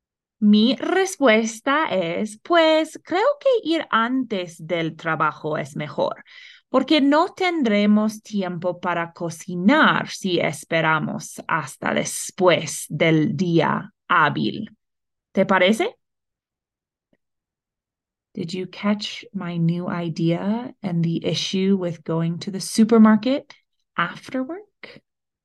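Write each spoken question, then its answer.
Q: Did you catch my new idea and the issue with going to the supermarket after work?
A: Go before work; after work there would be no time to cook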